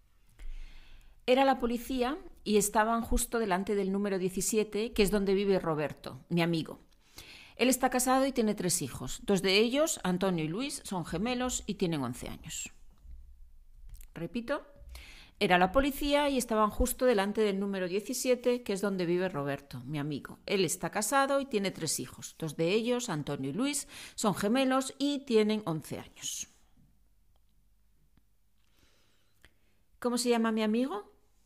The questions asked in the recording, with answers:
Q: ¿Cómo se llama mi amigo?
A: Tu amigo se llama Roberto.